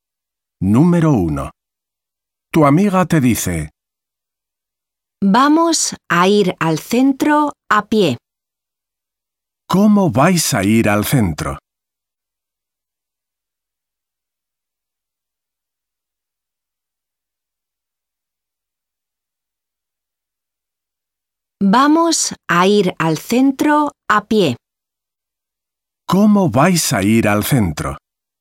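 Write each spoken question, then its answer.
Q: ¿Cómo vais a ir al centro?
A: a pie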